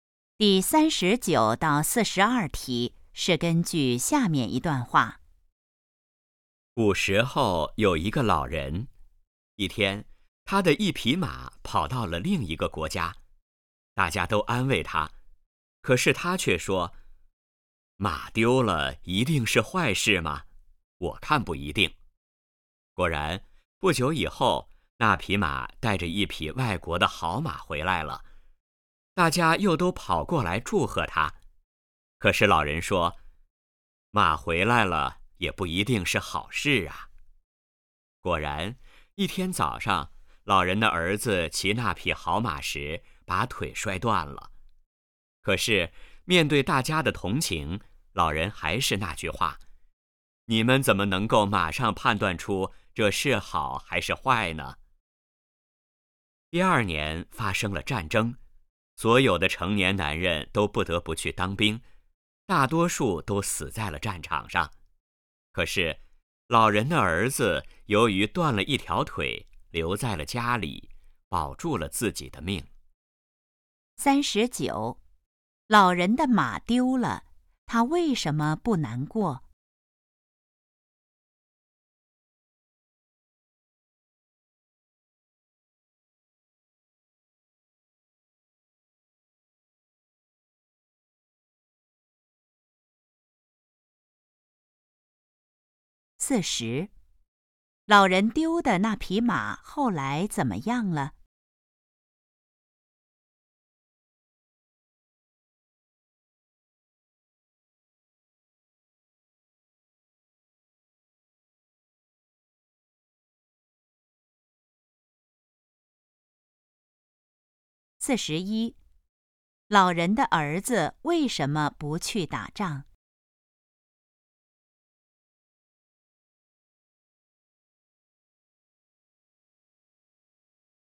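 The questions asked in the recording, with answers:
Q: 老人丢的那匹马后来怎么样了?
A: 带着一匹外国的好马回来了

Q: 老人的儿子为什么不去打仗?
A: 他断了一条腿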